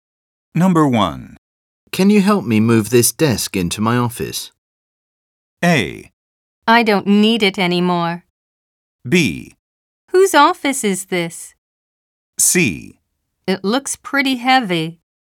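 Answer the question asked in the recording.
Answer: C: It looks pretty heavy.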